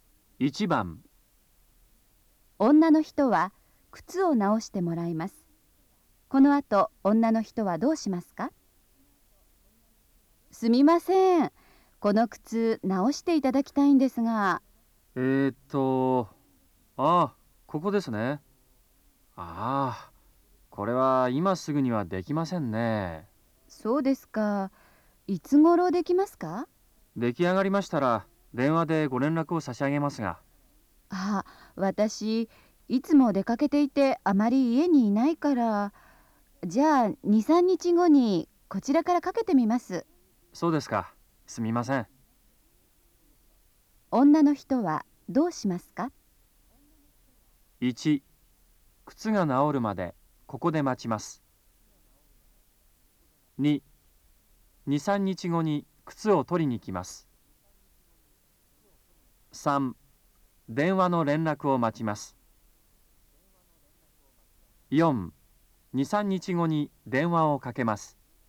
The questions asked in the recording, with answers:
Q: 女の人はどうしますか?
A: 1番、4